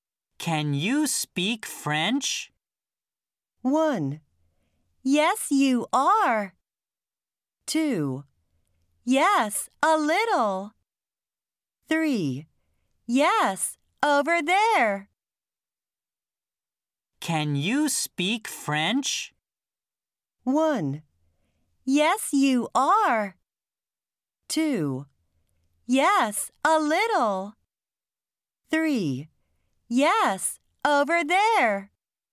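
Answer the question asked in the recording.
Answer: 2: Yes, a little.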